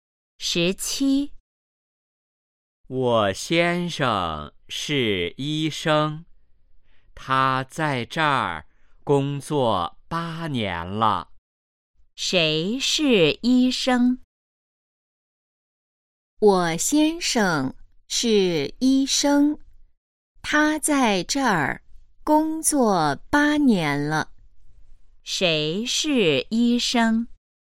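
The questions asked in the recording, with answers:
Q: 谁是医生?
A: 他先生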